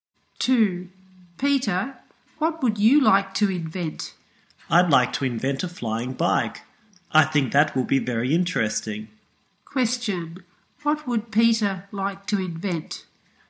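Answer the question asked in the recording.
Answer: A flying bike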